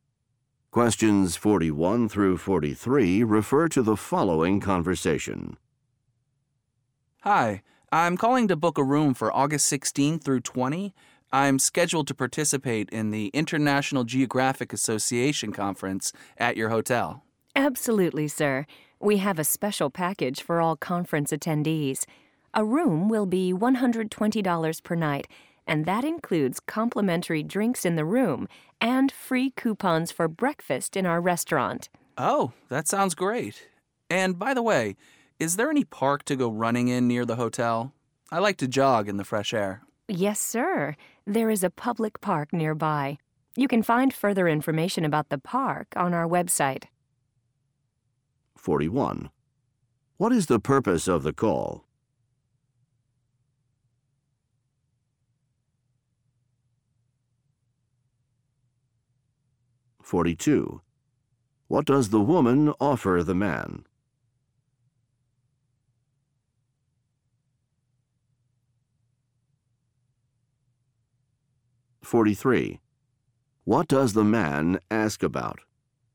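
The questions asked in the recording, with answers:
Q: What is the purpose of the call?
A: To book a hotel room

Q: What does the woman offer the man?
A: A special conference package with free drinks and breakfast coupons

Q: What does the man ask about?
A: A park near the hotel for running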